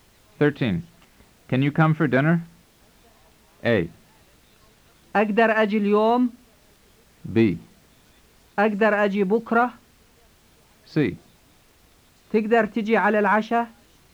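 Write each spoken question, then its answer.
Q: Can you come for dinner?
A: C: تقدر تجي على العشاء؟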